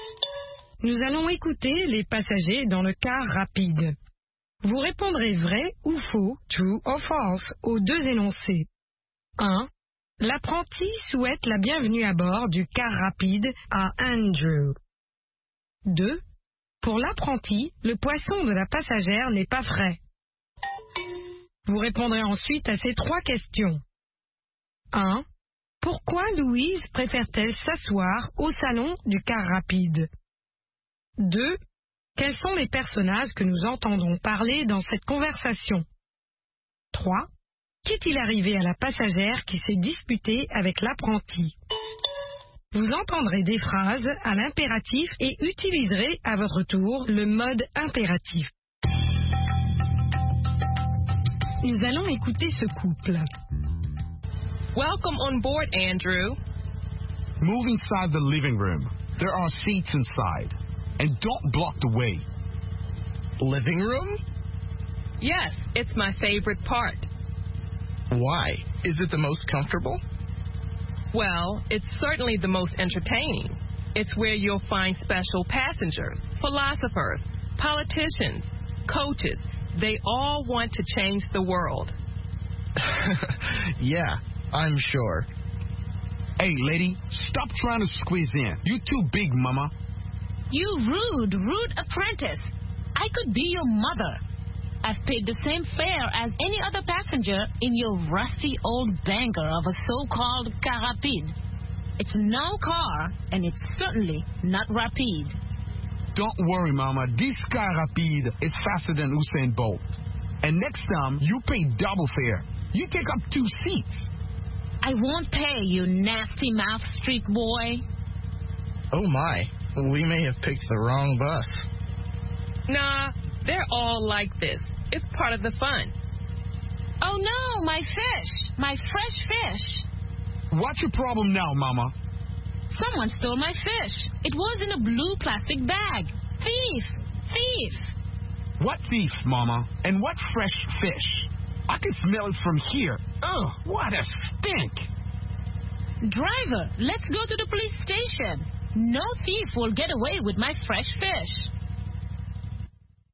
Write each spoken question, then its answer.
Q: Pour l'apprenti, le poisson de la passagère n'est pas frais.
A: L'énoncé 2 est vrai.

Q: Pourquoi Louise préfère-t-elle s'asseoir au salon du car rapide?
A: C'est son endroit préféré.

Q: Quels sont les personnages que nous entendons parler dans cette conversation?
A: Louise, Andrew, l'apprenti et la passagère.

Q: Qu'est-il arrivé à la passagère qui s'est disputée avec l'apprenti?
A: Quelqu'un est descendu avec son poisson frais.